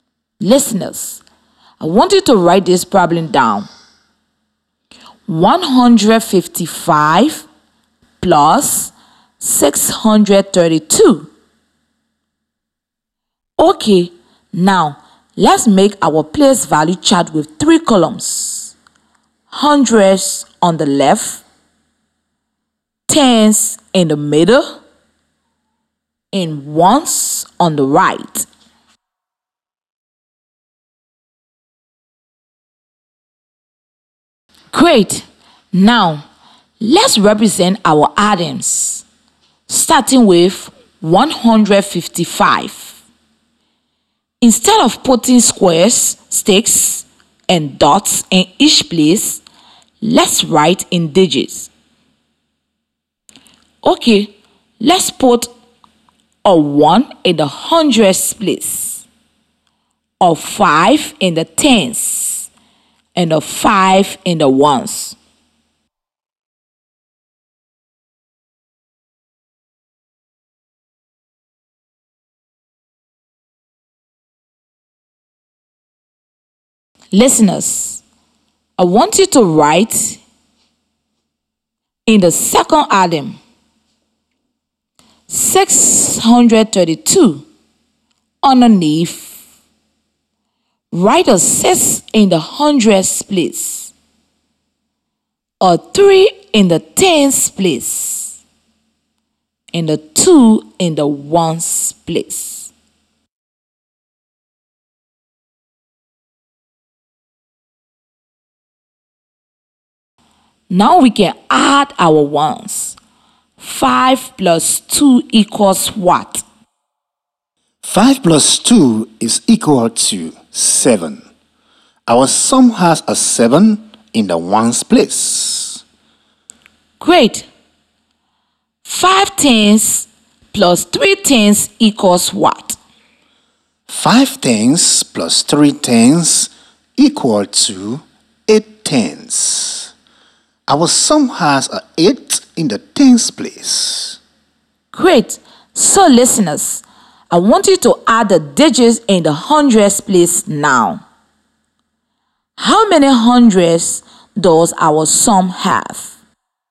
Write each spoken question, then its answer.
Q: How many hundreds does our sum have?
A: +600 = 700. The sum should have a 7 in the hundreds place.